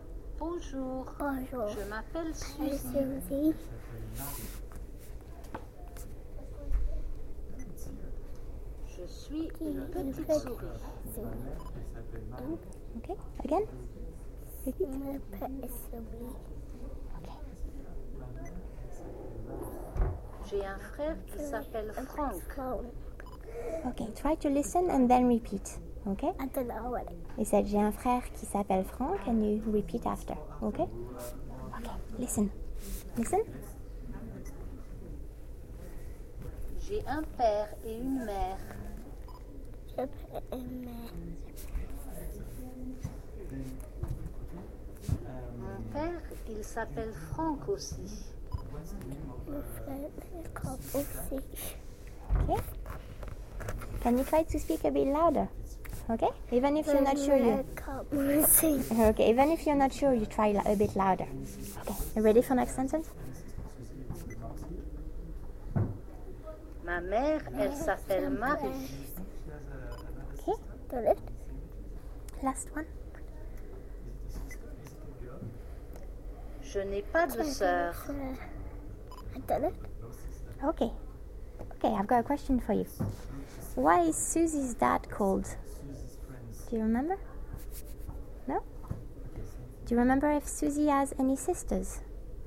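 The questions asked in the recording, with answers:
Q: Why is Susie's dad called?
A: Frank

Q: Do you remember if Susie has any sisters?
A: No, she has no sister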